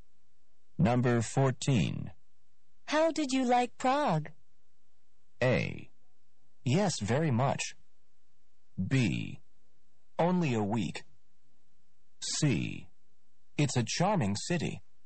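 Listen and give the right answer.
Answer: C: It's a charming city.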